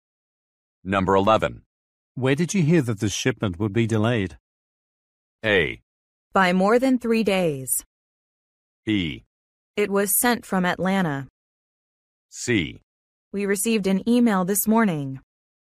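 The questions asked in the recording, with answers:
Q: Where did you hear that the shipment would be delayed?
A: C: We received an email this morning.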